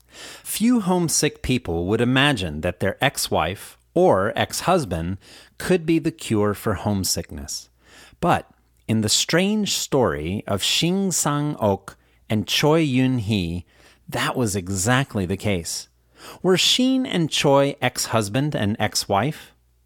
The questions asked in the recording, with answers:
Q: Were Shin and Choi ex-husband and ex-wife?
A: Yes, Shin and Choi were ex-husband and ex-wife.